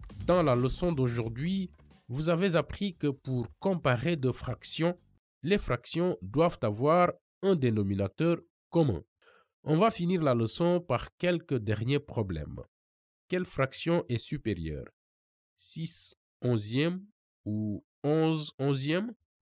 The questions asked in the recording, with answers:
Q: Quelle fraction est supérieure?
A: 11 onzième est supérieur à 6 onzième car le numérateur 11 est supérieur au numérateur 6.